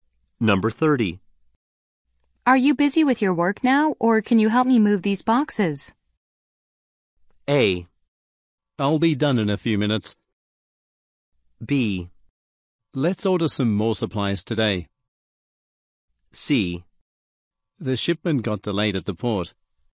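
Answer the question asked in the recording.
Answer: A: I'll be done in a few minutes.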